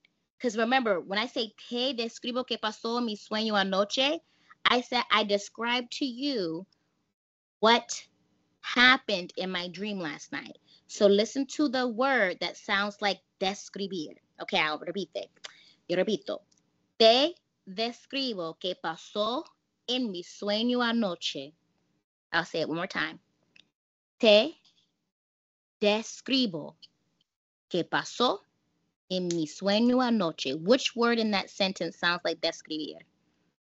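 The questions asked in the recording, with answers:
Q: Which word in that sentence sounds like describir?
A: describo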